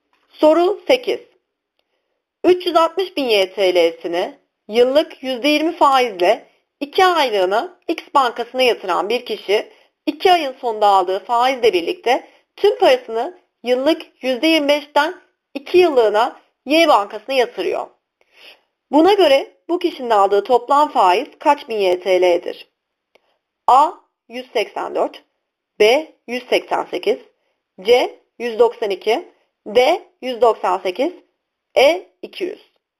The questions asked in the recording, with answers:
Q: Buna göre bu kişinin aldığı toplam faiz kaç bin YTL'dir?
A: Doğru yanıt D 198.